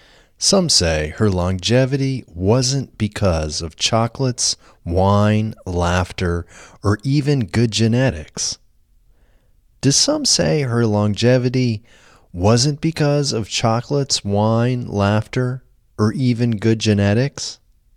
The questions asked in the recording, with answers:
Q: Do some say her longevity wasn't because of chocolates, wine, laughter, or even good genetics?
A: Yes, some say her longevity wasn't because of chocolates, wine, laughter, or even good genetics.